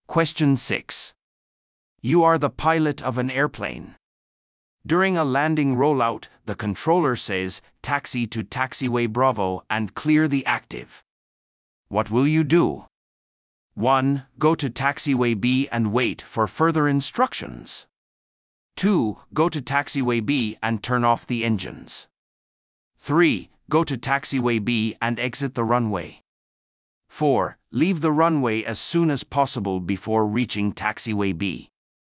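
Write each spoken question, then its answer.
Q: During a landing rollout, the controller says, "Taxi to taxiway Bravo and clear the active." What will you do?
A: 3: Go to taxiway B and exit the runway.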